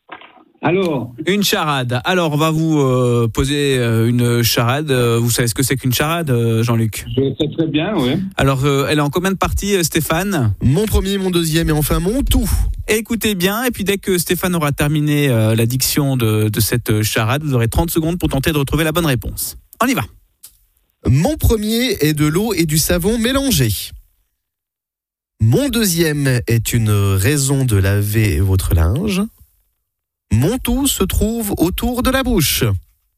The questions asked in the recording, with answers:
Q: Mon premier est de l'eau et du savon mélangés. Mon deuxième est une raison de laver votre linge. Mon tout se trouve autour de la bouche.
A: C'était la moustache.